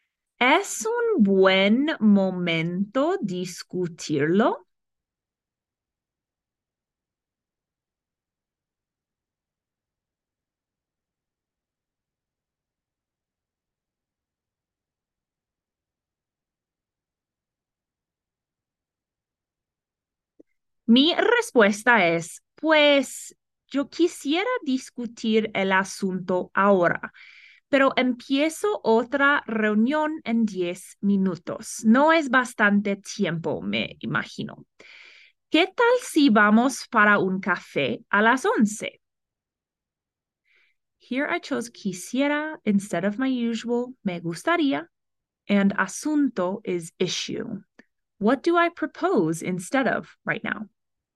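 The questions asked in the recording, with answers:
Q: What do I propose instead of right now?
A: Going for a coffee at 11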